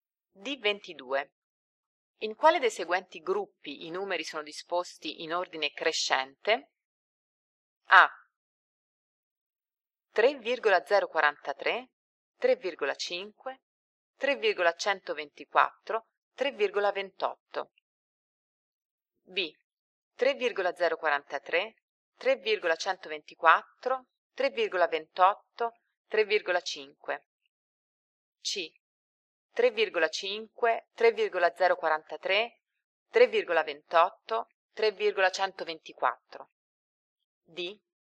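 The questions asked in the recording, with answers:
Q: In quale dei seguenti gruppi i numeri sono disposti in ordine crescente?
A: B: 3,043, 3,124, 3,28, 3,5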